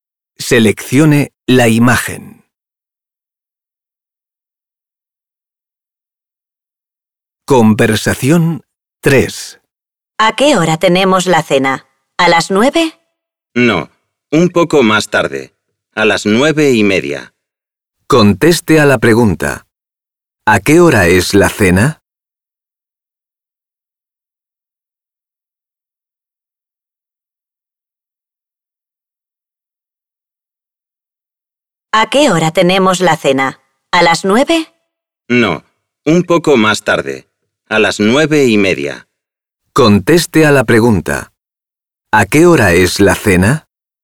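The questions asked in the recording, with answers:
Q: ¿A qué hora es la cena?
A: A las 9:30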